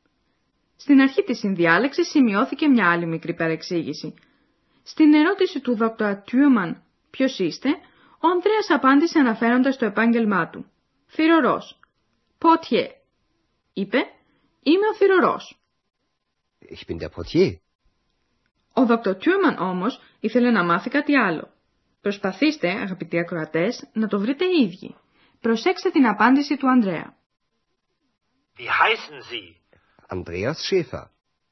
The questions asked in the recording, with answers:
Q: Ο Dr. Thürmann όμως ήθελε να μάθει κάτι άλλο.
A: Ο Dr. Thürmann ζήτησε να μάθει το όνομα του Ανδρέα.